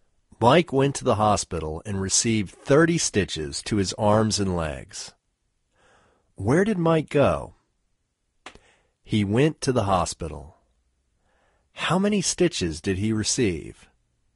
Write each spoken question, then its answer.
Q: How many stitches did he receive?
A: He received 30 stitches.